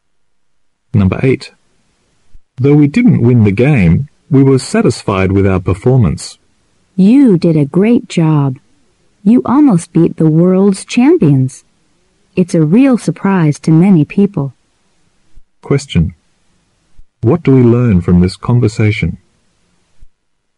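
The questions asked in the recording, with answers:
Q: What do we learn from this conversation?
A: They lost the game but played very well against the world champions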